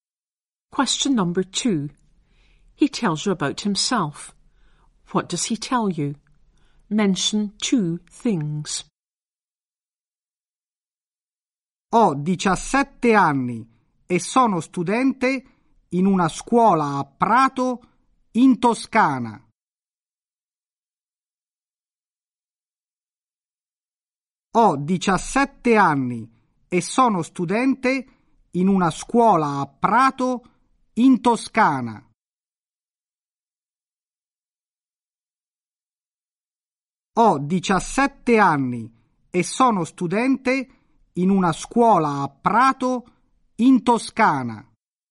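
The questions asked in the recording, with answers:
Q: What does he tell you? Mention two things.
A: He is 17 and a student at a school in Prato, Tuscany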